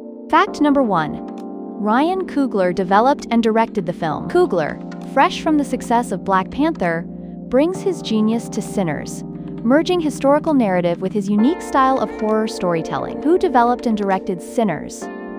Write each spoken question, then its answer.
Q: Who developed and directed Sinners?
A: Correct answer, Ryan Coogler.